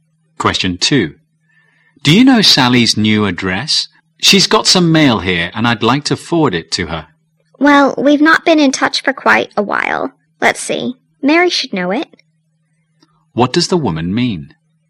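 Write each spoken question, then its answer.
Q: What does the woman mean?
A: She doesn't know Sally's address; Mary may know it.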